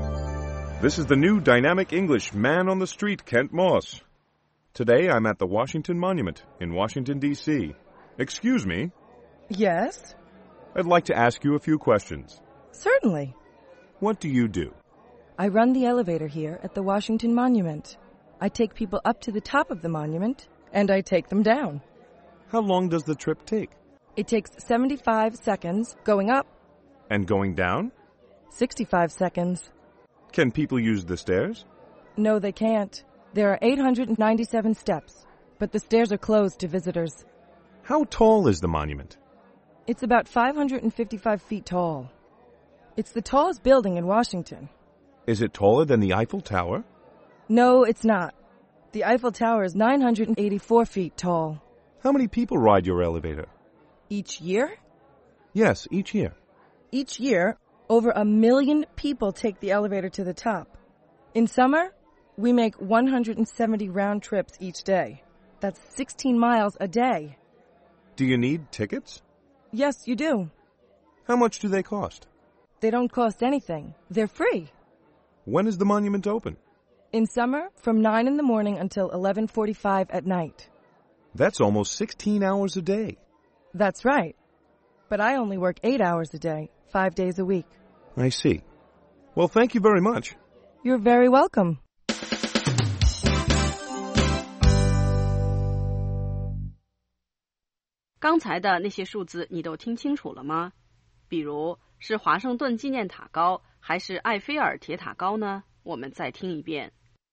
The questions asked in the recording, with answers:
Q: 比如是华盛顿纪念塔高还是埃菲尔铁塔高呢?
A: No, it's not. The Eiffel Tower is 984 feet tall.